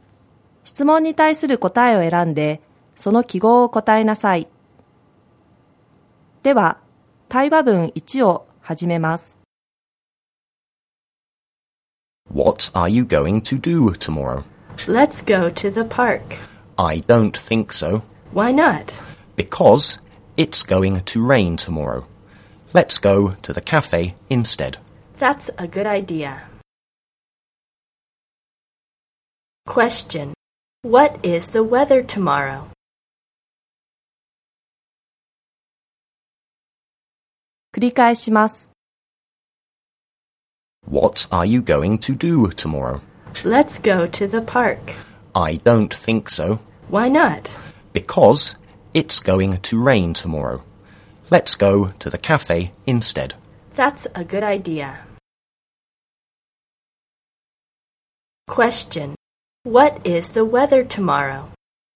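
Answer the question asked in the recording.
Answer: It's going to rain.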